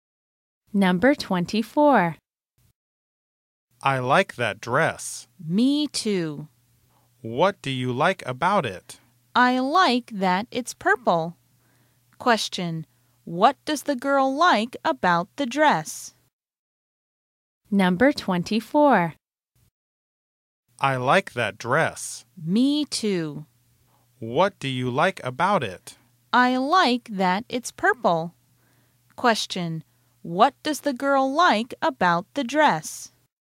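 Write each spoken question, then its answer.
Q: What does the girl like about the dress?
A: It's purple.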